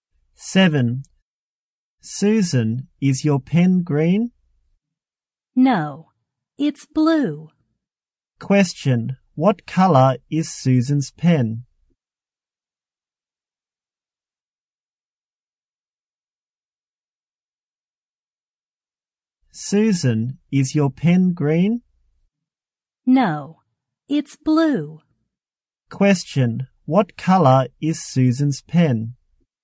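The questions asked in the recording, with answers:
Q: What color is Susan's pen?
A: Blue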